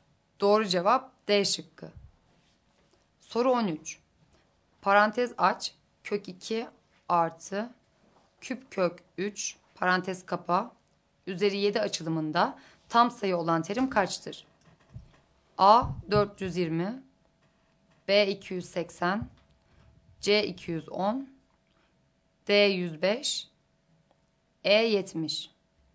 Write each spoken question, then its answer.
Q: Üzeri 7 açılımında tam sayı olan terim kaçtır?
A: Doğru cevap A şıkkı.